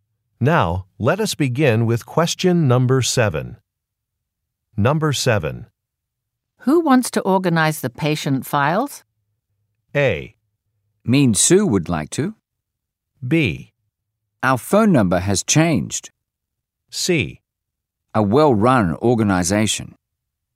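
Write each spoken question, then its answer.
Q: Who wants to organize the patient files?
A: A: Mean Sue would like to.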